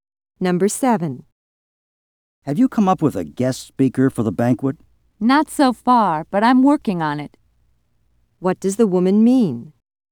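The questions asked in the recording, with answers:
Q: What does the woman mean?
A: She hasn't found a guest speaker yet but is still trying.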